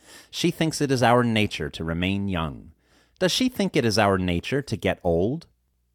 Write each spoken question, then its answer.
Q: Does she think it is our nature to get old?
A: No, she does not think it is our nature to get old.